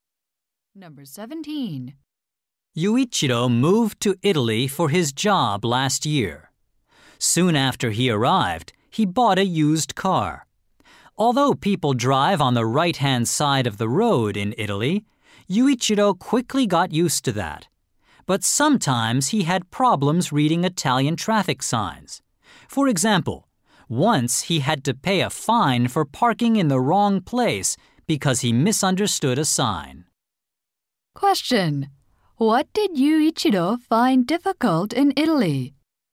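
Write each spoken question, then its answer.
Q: What did Yuichiro find difficult in Italy?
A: Reading Italian traffic signs.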